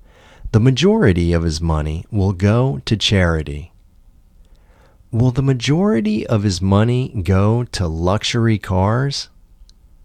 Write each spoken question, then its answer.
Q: Will the majority of his money go to luxury cars?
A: No, the majority of his money won't go to luxury cars.